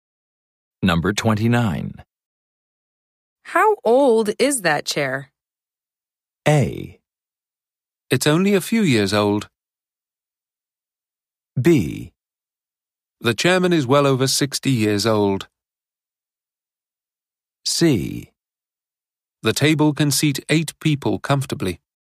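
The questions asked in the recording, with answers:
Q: How old is that chair?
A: A: It's only a few years old.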